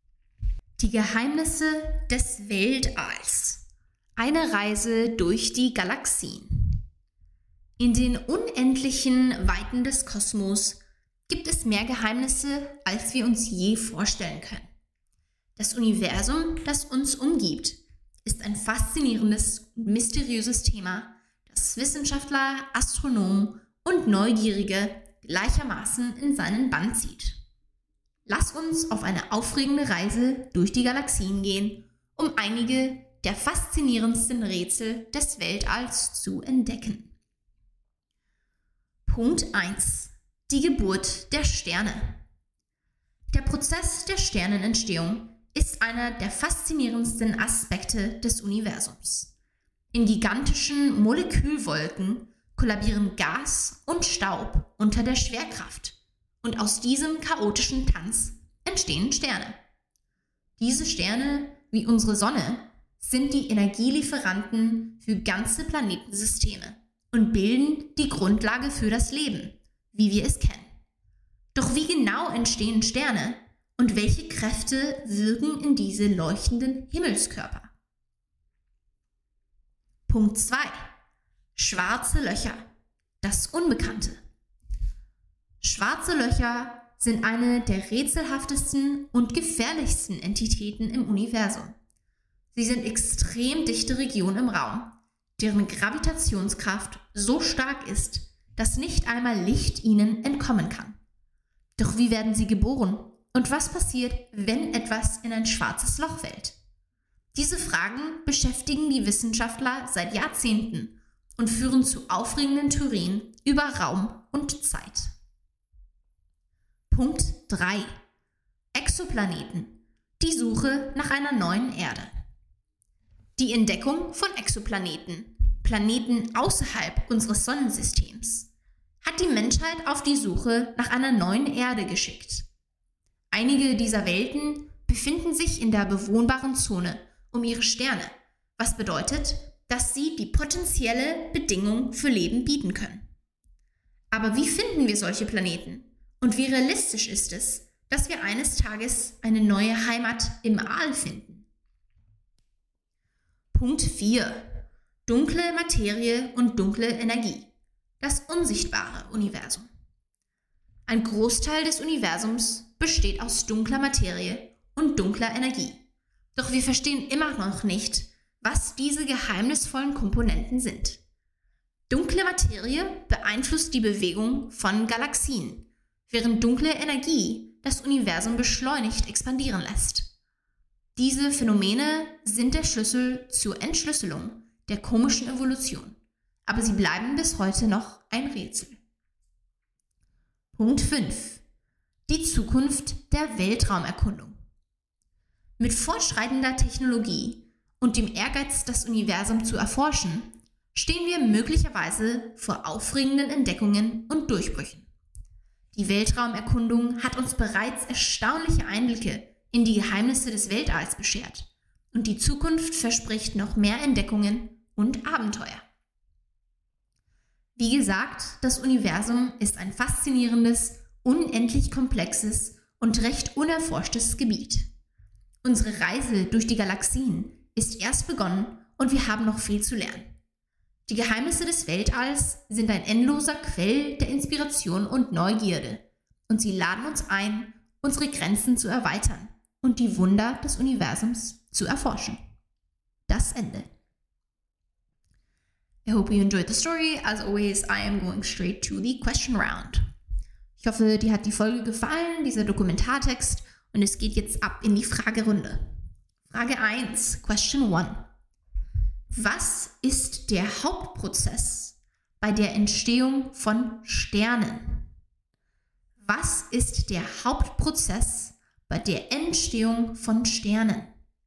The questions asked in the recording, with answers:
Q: Was ist der Hauptprozess bei der Entstehung von Sternen?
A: Der Hauptprozess bei der Entstehung von Sternen ist die Kondensation von Gas und Staub in gigantische Molekülwolken unter dem Einfluss der Schwerkraft.